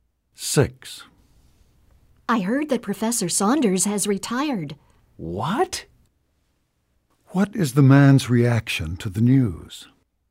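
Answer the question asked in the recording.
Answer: He is surprised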